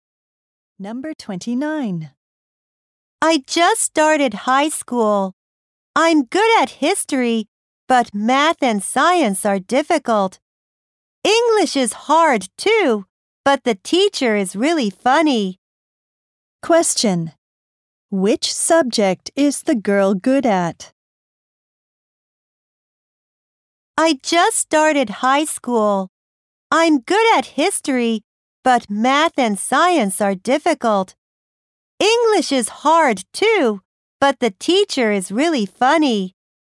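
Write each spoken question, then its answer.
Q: Question. Which subject is the girl good at?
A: History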